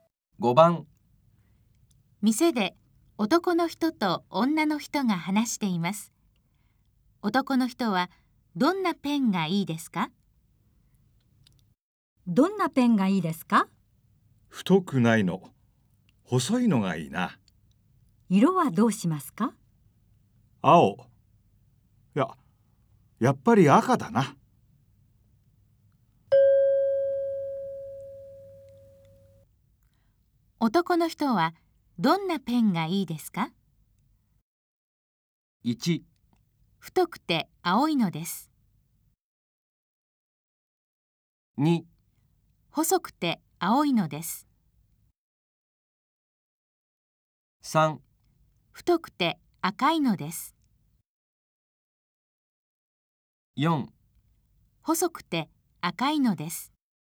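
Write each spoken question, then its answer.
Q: 男の人はどんなペンがいいですか?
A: 4: 細くて赤いのです。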